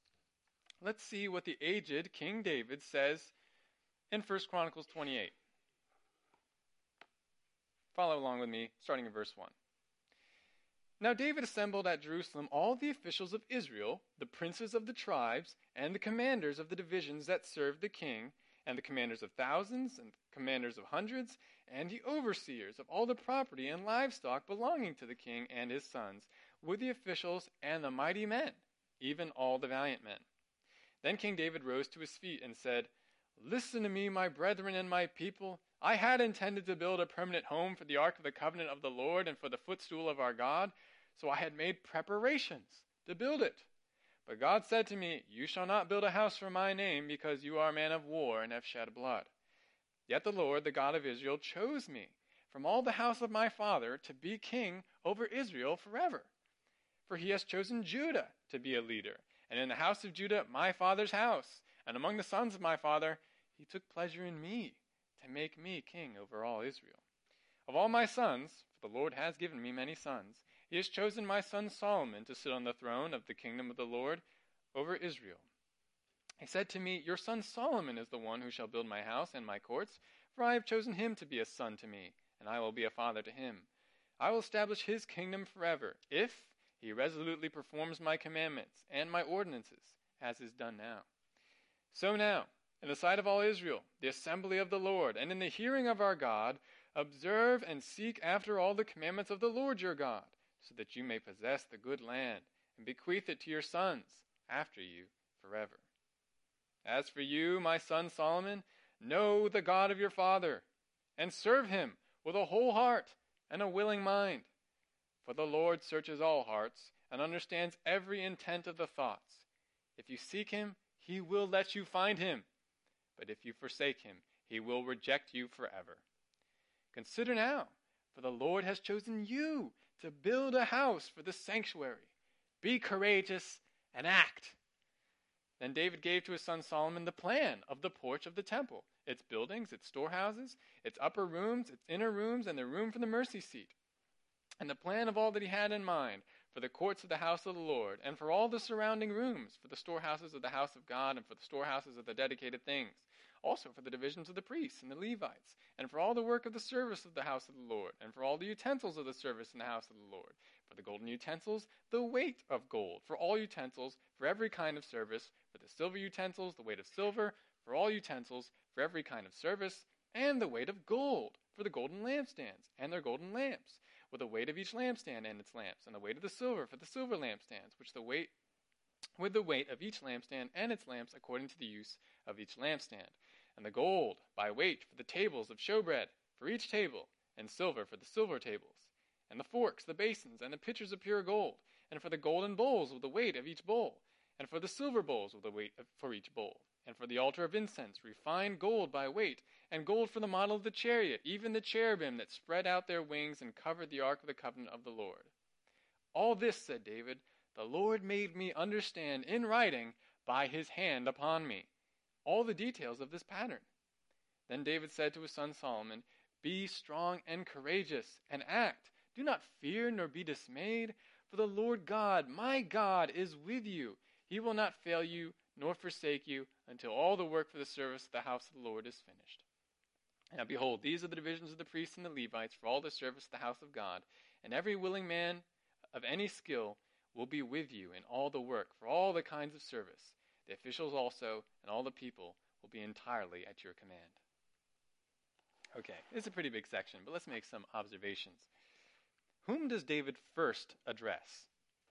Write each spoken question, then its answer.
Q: Whom does David first address?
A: That's right, various officials of Israel.